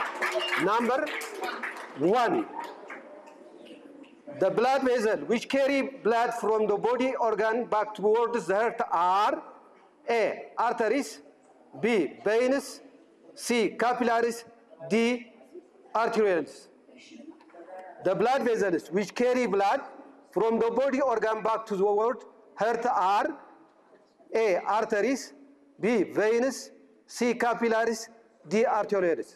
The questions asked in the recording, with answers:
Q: The blood vessels which carry blood from the body organ back towards the heart are A, arteries, B, veins, C, capillaries, D, arterioles.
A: Veins.